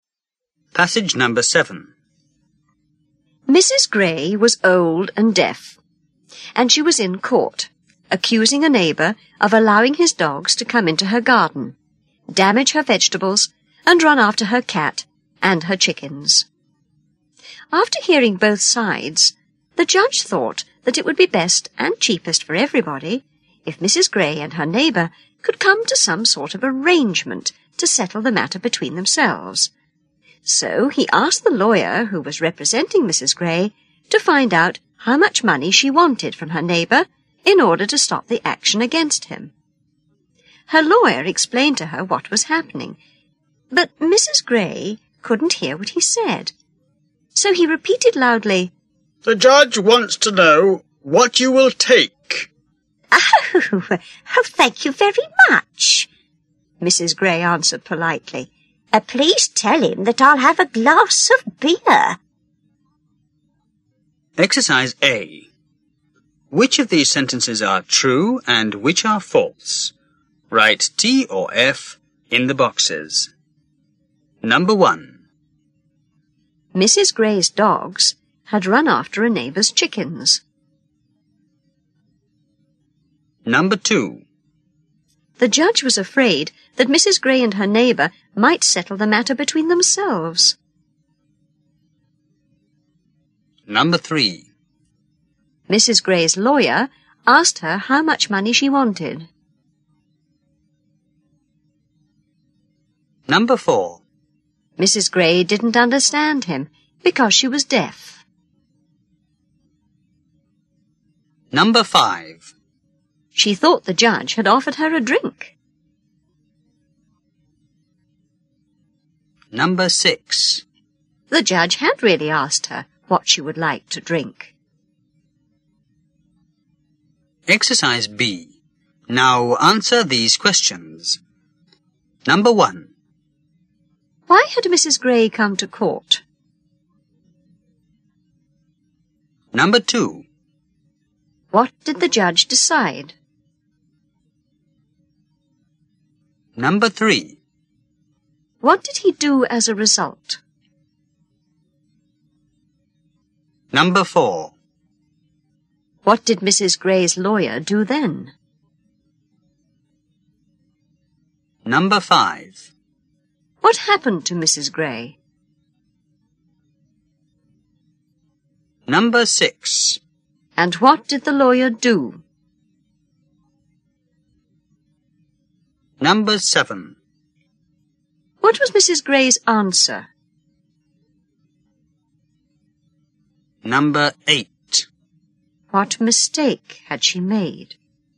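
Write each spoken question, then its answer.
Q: Why had Mrs. Gray come to court?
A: To accuse a neighbour of letting his dogs into her garden, damaging her vegetables and chasing her cat and chickens.

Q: What did the judge decide?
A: That it would be best and cheapest if they settled the matter between themselves.

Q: What did he do as a result?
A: He asked her lawyer to find out how much money she wanted to stop the action.

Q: What did Mrs. Gray's lawyer do then?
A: He explained to her what was happening.

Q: What happened to Mrs. Gray?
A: She couldn't hear what he said.

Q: And what did the lawyer do?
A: He repeated loudly, "The judge wants to know what you will take."

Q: What was Mrs. Gray's answer?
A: She thanked him and said she'd have a glass of beer.

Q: What mistake had she made?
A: She thought the judge was offering her a drink.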